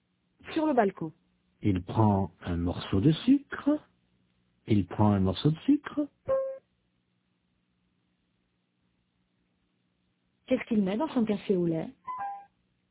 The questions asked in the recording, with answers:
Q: Qu'est-ce qu'il met dans son café au lait?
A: Un morceau de sucre.